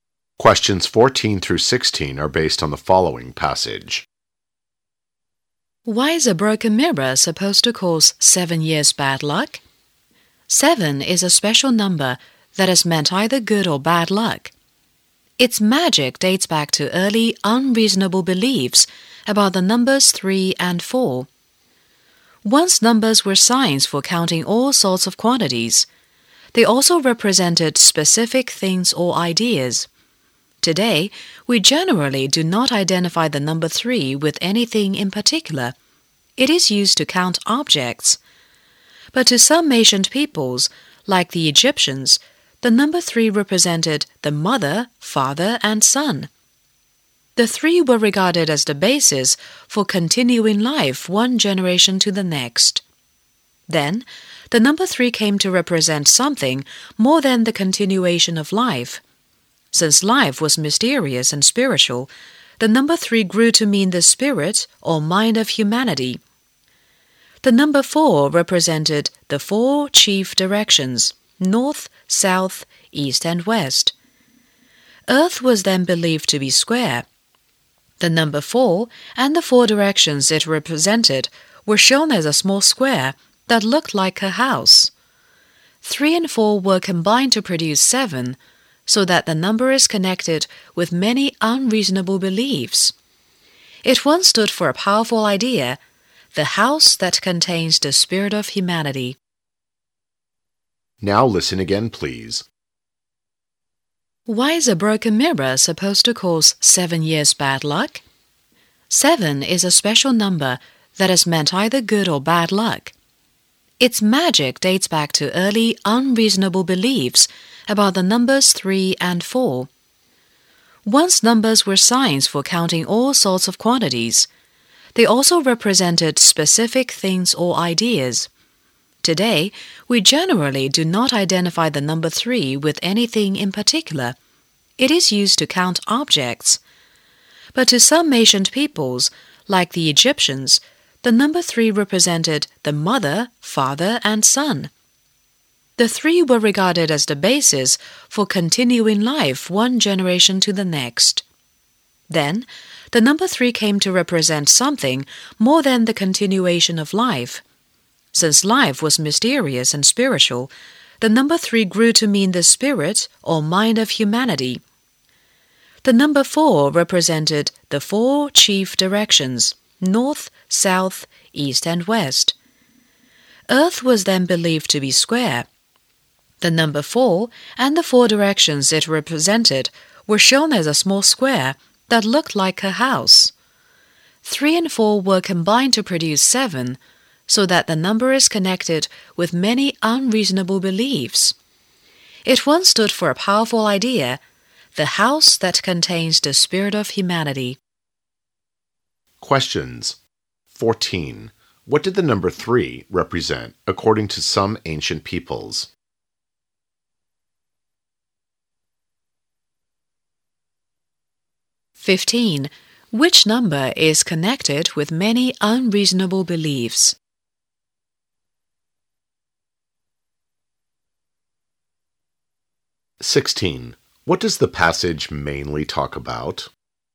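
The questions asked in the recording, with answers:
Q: What did the number three represent according to some ancient peoples?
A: The mother, father and son

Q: Which number is connected with many unreasonable beliefs?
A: Seven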